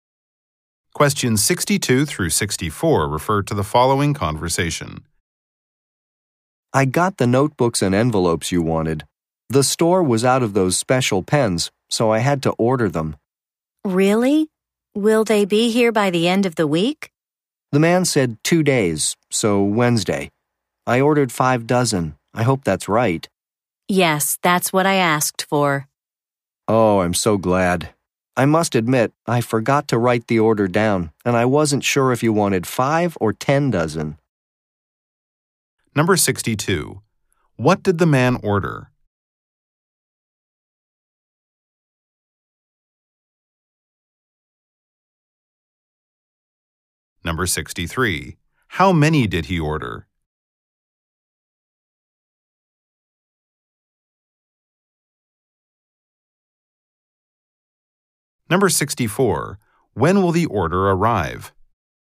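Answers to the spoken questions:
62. Special pens
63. 5 dozen
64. Wednesday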